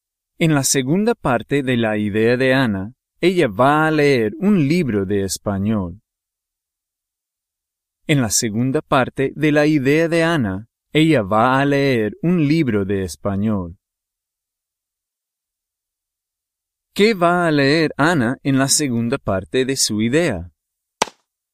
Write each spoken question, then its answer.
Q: ¿Qué va a leer Anna en la segunda parte de su idea?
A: Un libro de español.